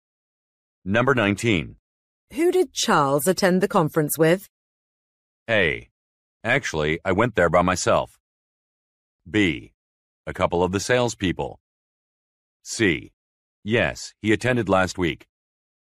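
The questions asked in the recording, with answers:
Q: Who did Charles attend the conference with?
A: B: A couple of the salespeople.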